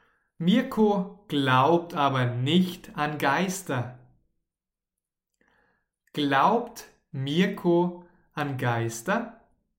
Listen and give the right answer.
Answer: Nein, er glaubt nicht an Geister.